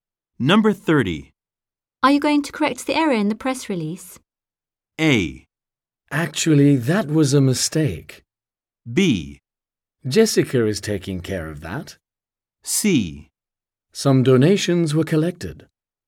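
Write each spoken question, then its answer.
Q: Are you going to correct the error in the press release?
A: B: Jessica is taking care of that.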